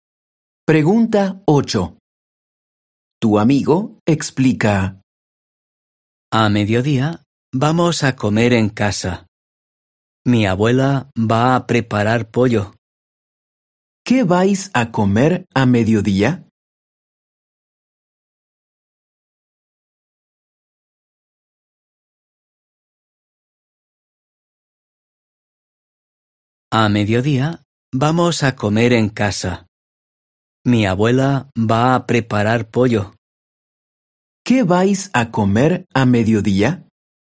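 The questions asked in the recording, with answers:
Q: ¿Qué vais a comer a mediodía?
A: Pollo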